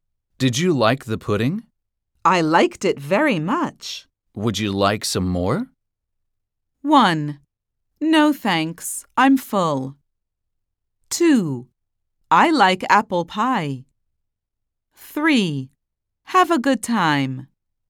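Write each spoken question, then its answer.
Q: Would you like some more?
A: 1: No thanks, I'm full.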